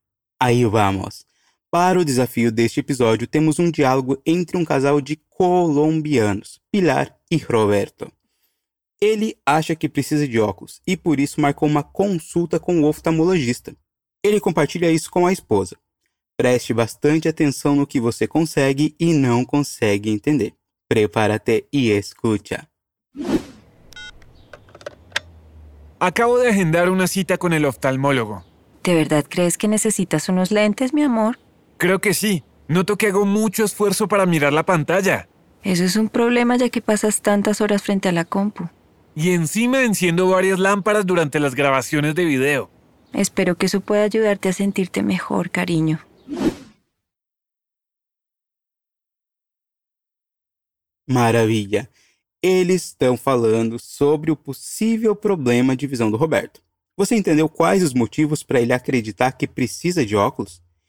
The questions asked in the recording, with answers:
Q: Você entendeu quais os motivos para ele acreditar que precisa de óculos?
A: Ele notou que faz muito esforço para olhar para a tela.